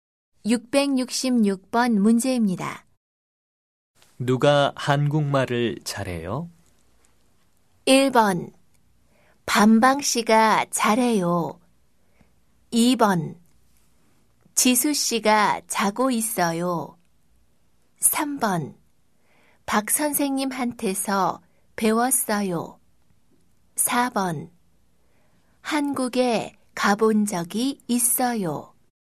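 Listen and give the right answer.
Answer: 1: 반방 씨가 잘해요.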